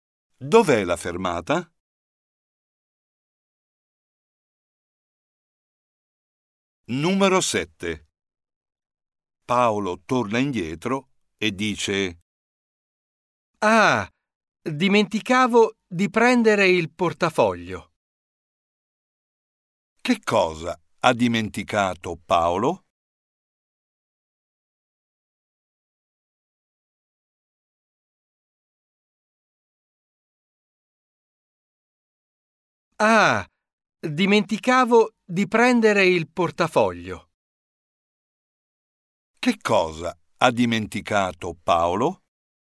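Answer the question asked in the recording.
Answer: il portafoglio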